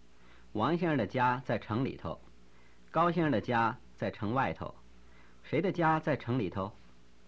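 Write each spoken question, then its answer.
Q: 谁的家在城里头?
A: 王先生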